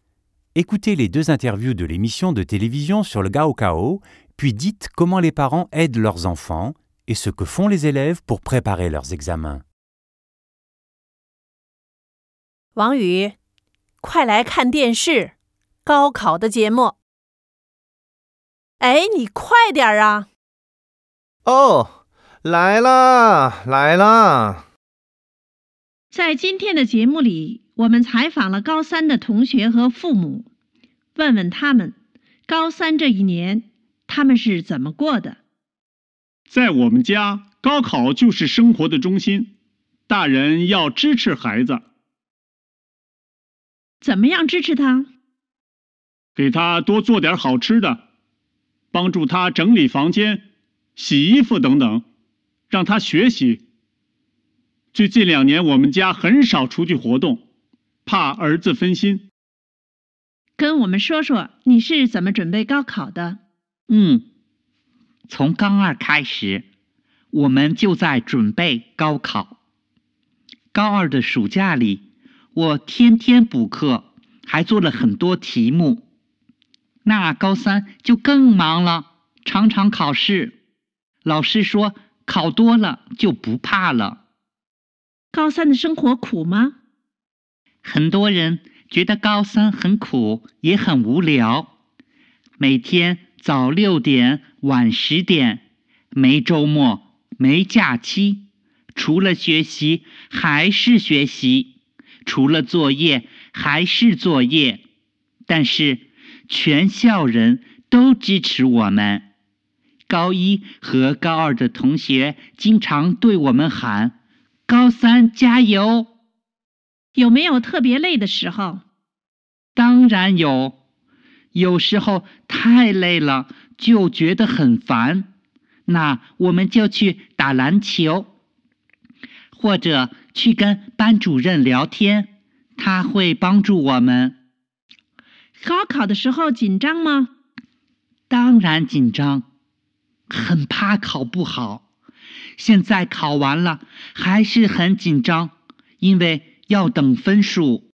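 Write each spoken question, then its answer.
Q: Écoutez les deux interviews de l'émission de télévision sur le Gaokao, puis dites comment les parents aident leurs enfants et ce que font les élèves pour préparer leurs examens.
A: Les parents préparent de bons repas, rangent la chambre, lavent les vêtements et sortent rarement pour ne pas distraire leur enfant ; les élèves prennent des cours de soutien l'été, font beaucoup d'exercices et d'examens, et étudient de 6h à 22h sans week-ends ni vacances.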